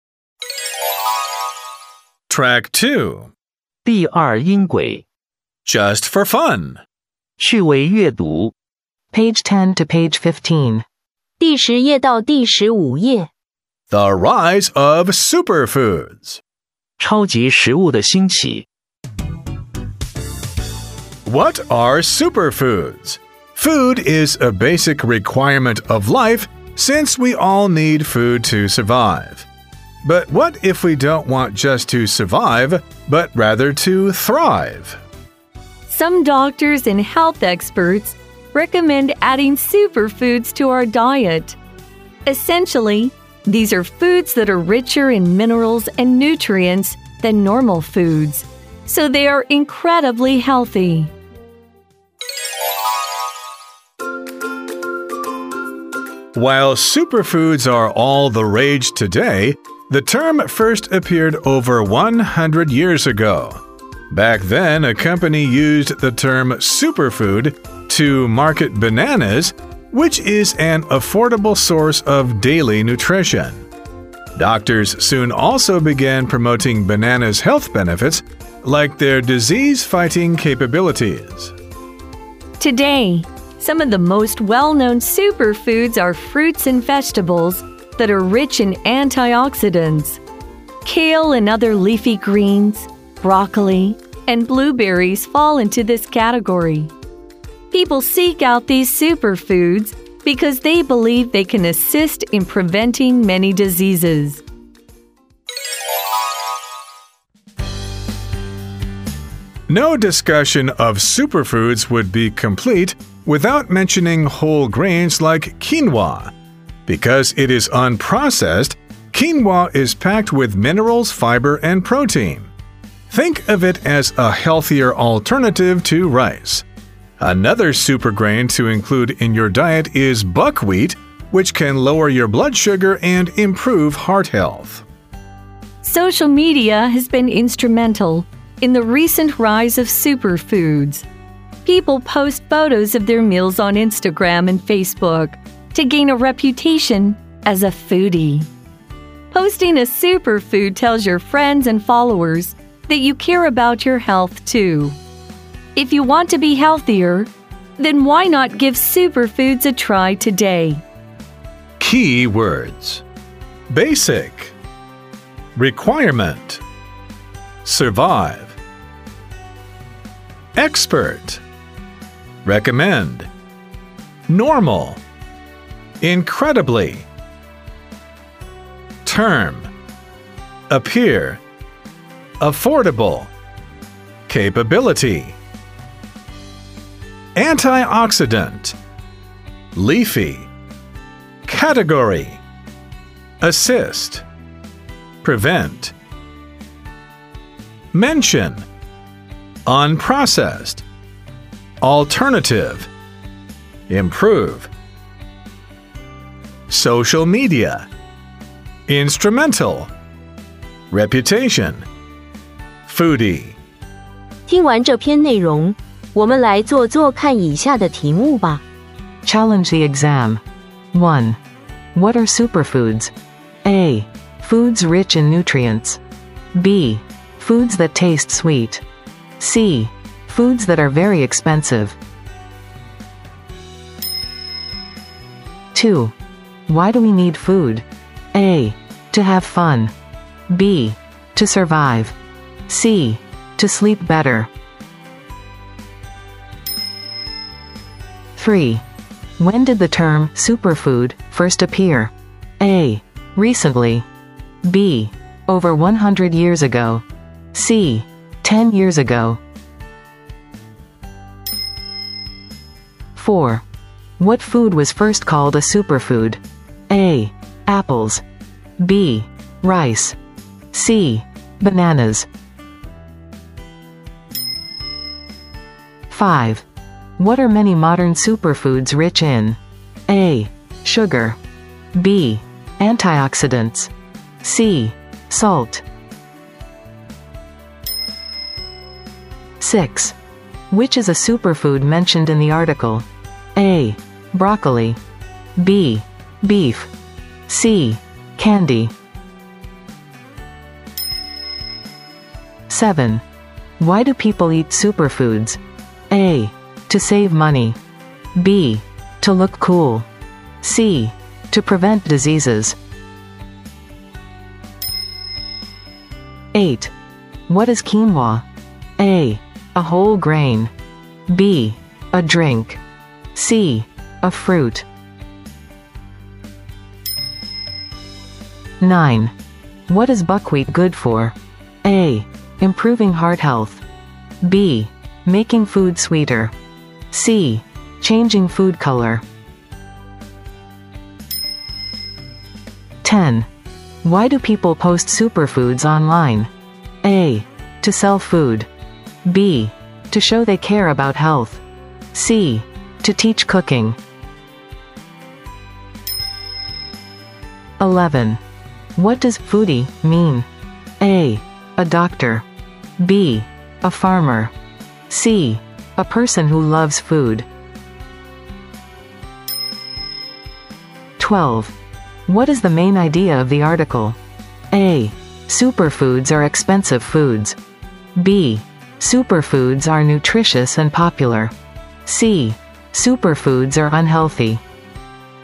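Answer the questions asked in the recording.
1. A: Foods rich in nutrients.
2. B: To survive.
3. B: Over 100 years ago.
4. C: Bananas.
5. B: Antioxidants.
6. A: Broccoli.
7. C: To prevent diseases.
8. A: A whole grain.
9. A: Improving heart health.
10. B: To show they care about health.
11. C: A person who loves food.
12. B: Superfoods are nutritious and popular.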